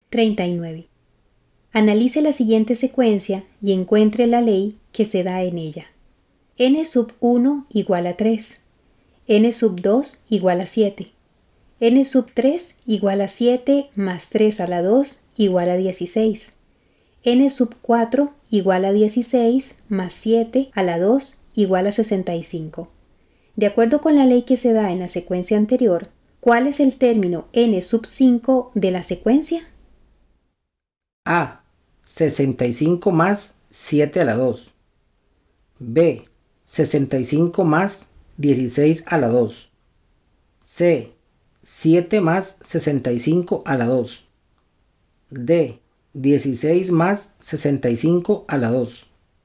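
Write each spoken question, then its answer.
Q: De acuerdo con la ley que se da en la secuencia anterior, ¿cuál es el término N sub 5 de la secuencia?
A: B: 65 más 16 a la 2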